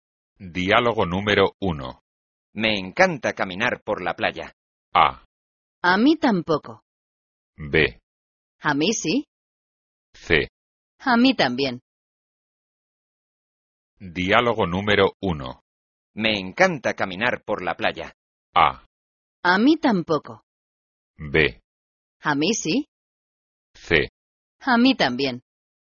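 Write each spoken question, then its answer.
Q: Me encanta caminar por la playa.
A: C: A mí también.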